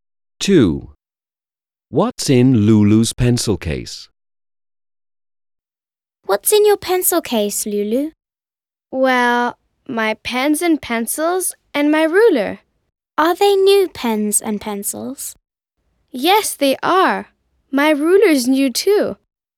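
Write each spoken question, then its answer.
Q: What's in Lulu's pencil case?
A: Her pens, pencils and ruler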